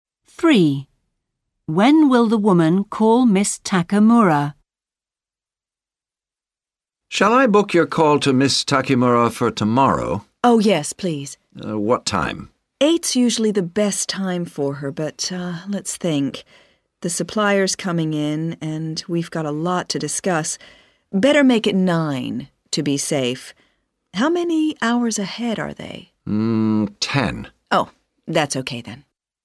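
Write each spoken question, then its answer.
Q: When will the woman call Miss Takemura?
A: At 9 o'clock tomorrow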